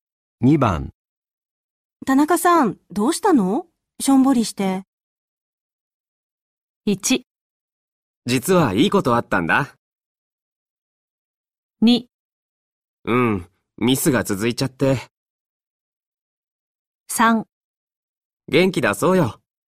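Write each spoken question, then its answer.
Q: 田中さん、どうしたのしょんぼりして。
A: 2: うん、ミスが続いちゃって。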